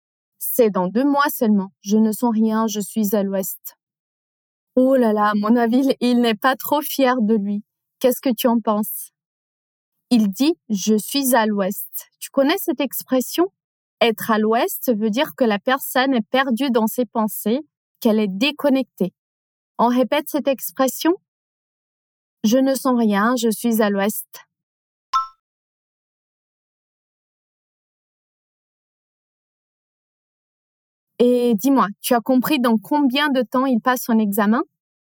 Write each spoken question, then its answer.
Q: Et dis-moi, tu as compris dans combien de temps il passe son examen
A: Bravo, dans deux mois.